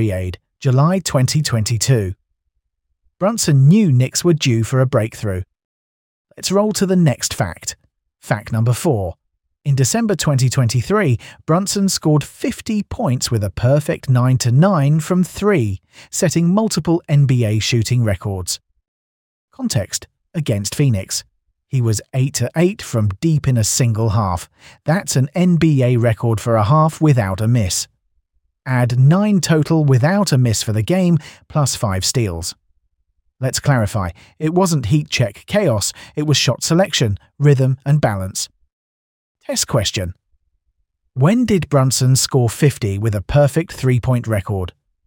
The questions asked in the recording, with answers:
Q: When did Brunson score 50 with a perfect 3-point record?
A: Correct answer. December 2023.